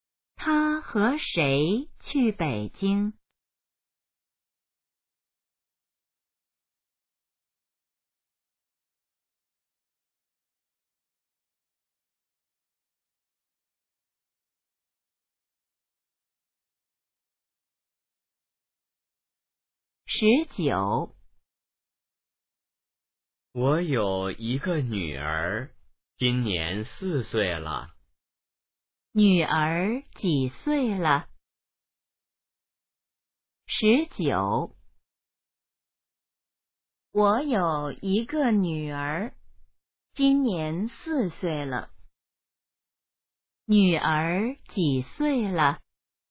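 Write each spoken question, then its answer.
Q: 女儿几岁了?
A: 4岁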